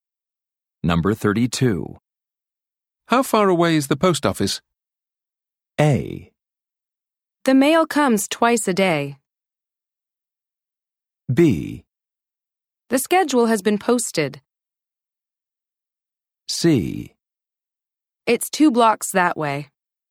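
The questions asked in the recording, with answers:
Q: How far away is the post office?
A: C: It's two blocks that way.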